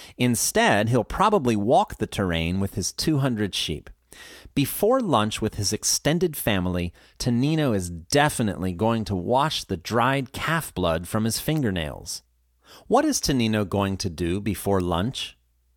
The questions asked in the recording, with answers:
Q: What is Tonino going to do before lunch?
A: Tonino is definitely going to wash the dried calf blood from his fingernails.